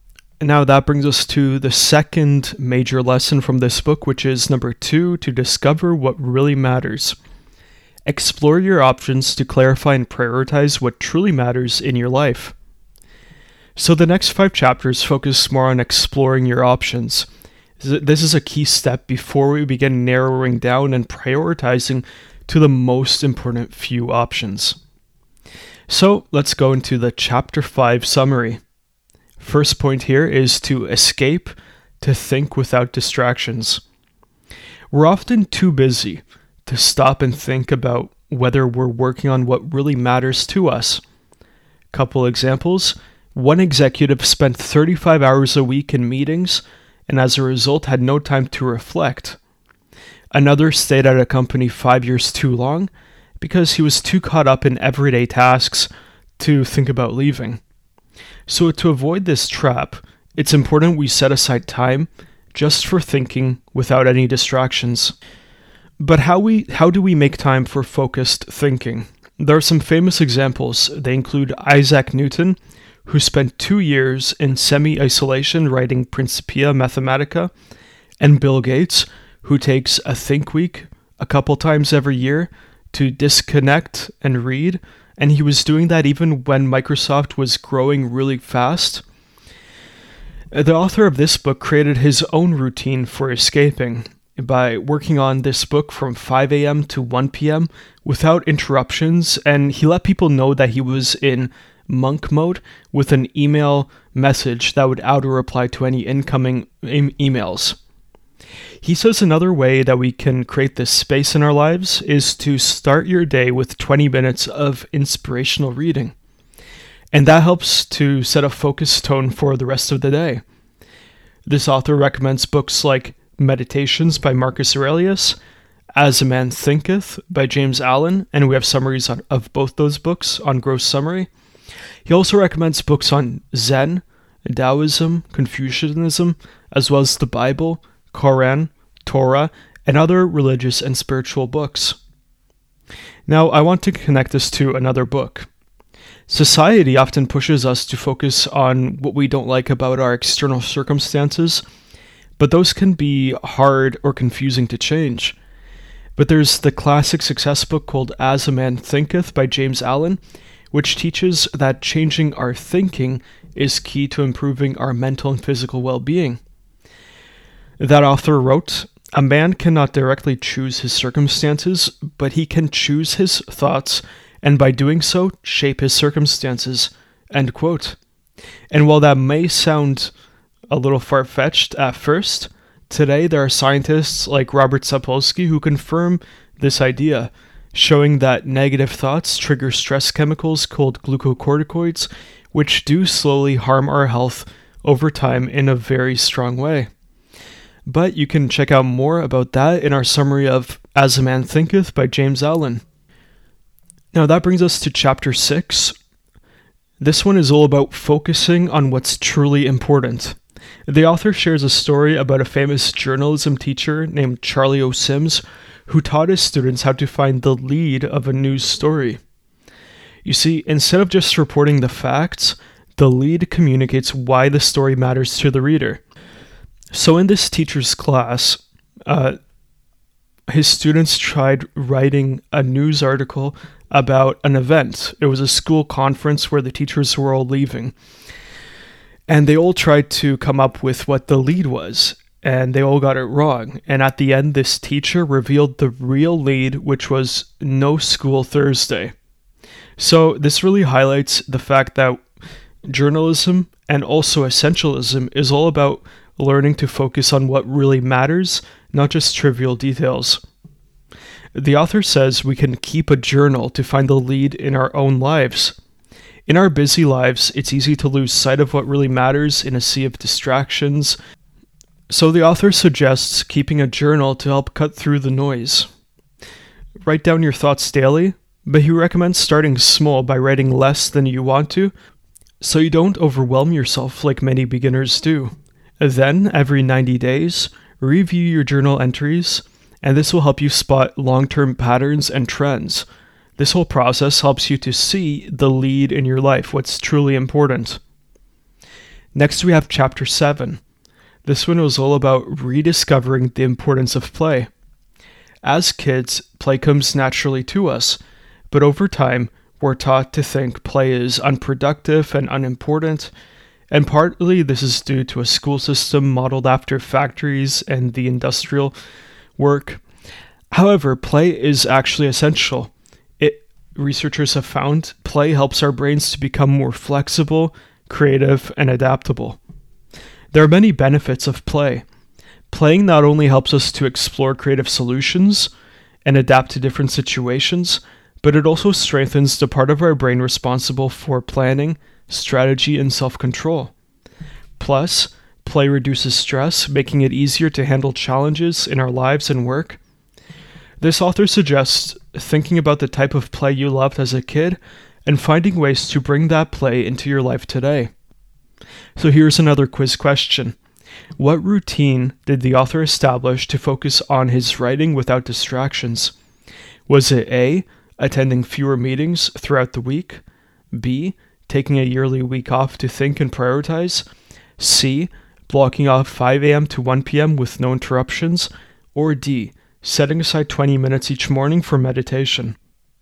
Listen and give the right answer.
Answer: The correct answer here is C, blocking off 5 a.m.